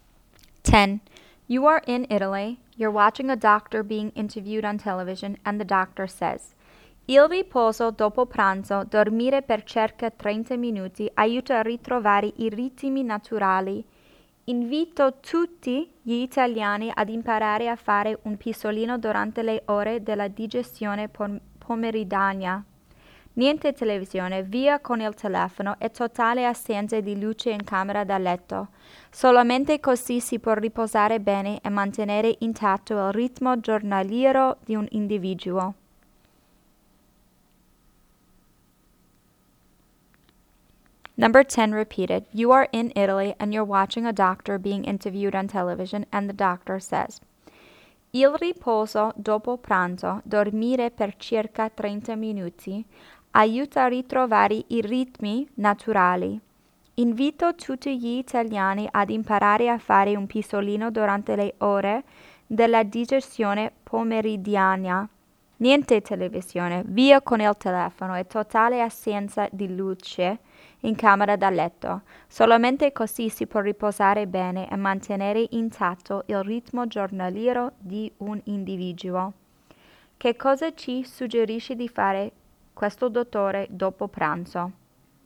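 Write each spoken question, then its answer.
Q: Che cosa ci suggerisce di fare questo dottore dopo pranzo?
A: Fare un pisolino di circa 30 minuti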